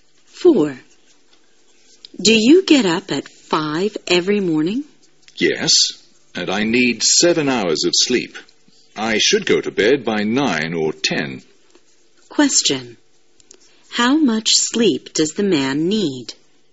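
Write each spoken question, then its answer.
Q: How much sleep does the man need?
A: 7 hours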